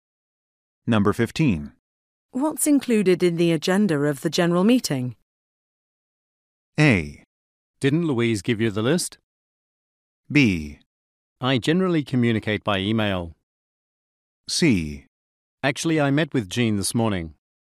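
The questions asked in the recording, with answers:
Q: What's included in the agenda of the general meeting?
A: A: Didn't Louise give you the list?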